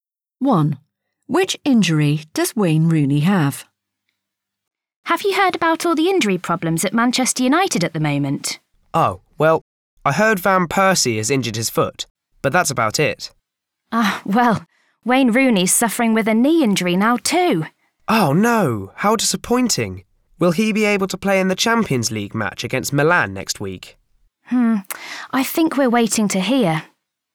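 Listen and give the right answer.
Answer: A knee injury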